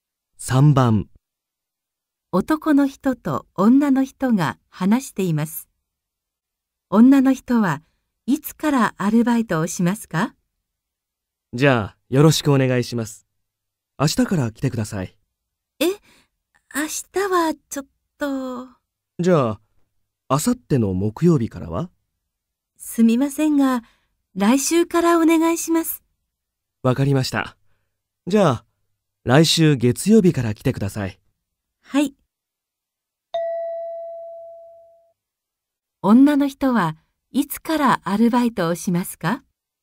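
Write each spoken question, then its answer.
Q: 女の人はいつからアルバイトをしますか?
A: 来週の月曜日から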